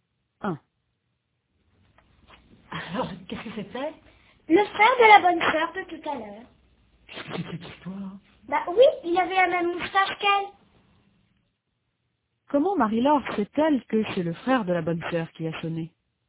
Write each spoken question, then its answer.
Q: Comment Marie-Laure sait-elle que c'est le frère de la bonne sœur qui a sonné ?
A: Parce qu'il avait la même moustache qu'elle.